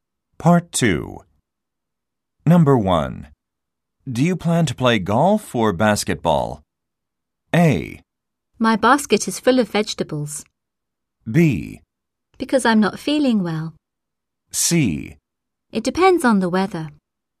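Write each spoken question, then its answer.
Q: Do you plan to play golf or basketball?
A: C: It depends on the weather.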